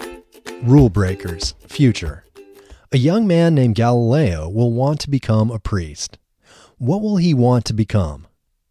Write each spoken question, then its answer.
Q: What will he want to become?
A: He will want to become a priest.